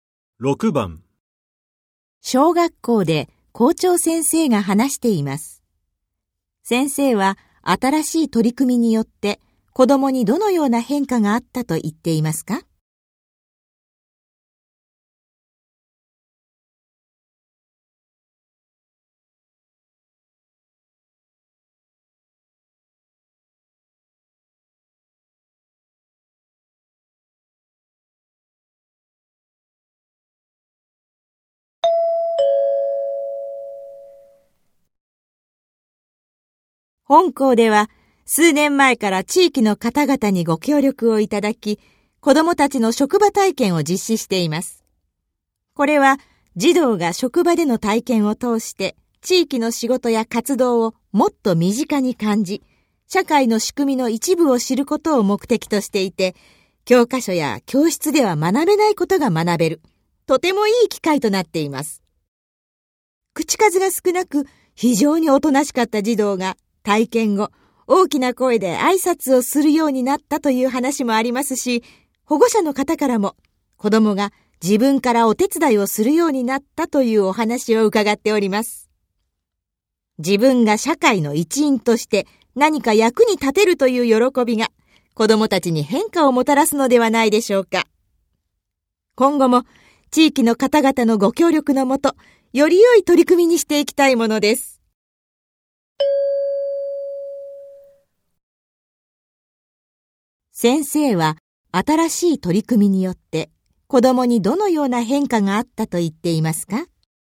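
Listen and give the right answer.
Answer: 大きな声で挨拶をしたり、自分からお手伝いをしたりするようになった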